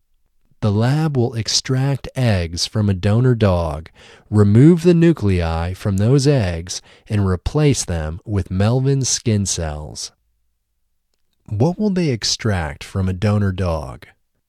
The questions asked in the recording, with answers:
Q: What will they extract from a donor dog?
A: They will extract eggs from a donor dog.